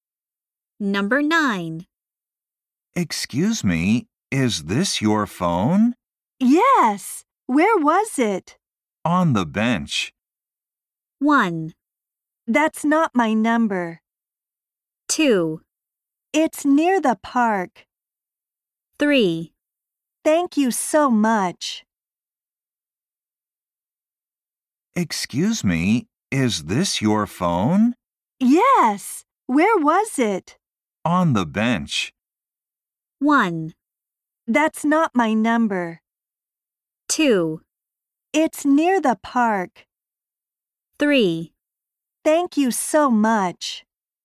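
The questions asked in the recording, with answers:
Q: On the bench.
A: 3: Thank you so much.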